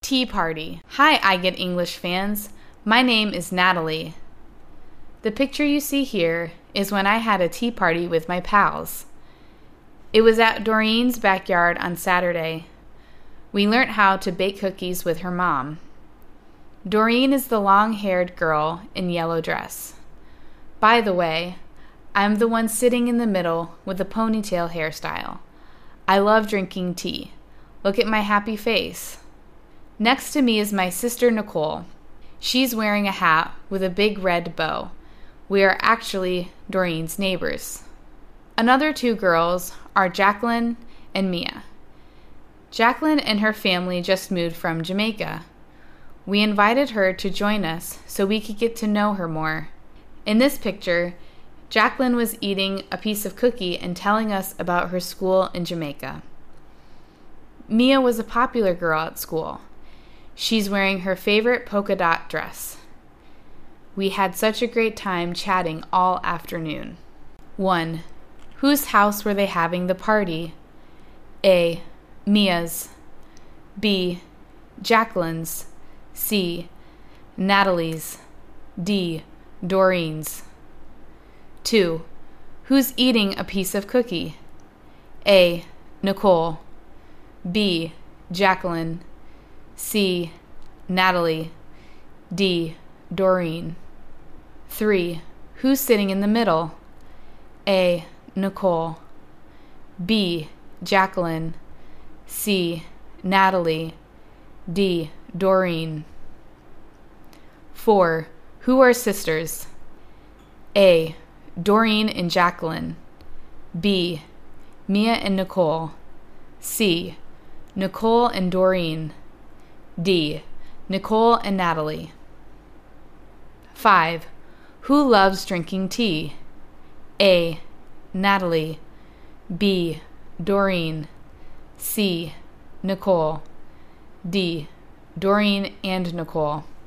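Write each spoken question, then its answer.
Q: Whose house were they having the party?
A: D: Doreen's.

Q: Who's eating a piece of cookie?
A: B: Jacqueline.

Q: Who's sitting in the middle?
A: C: Natalie.

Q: Who are sisters?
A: D: Nicole and Natalie.

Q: Who loves drinking tea?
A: A: Natalie.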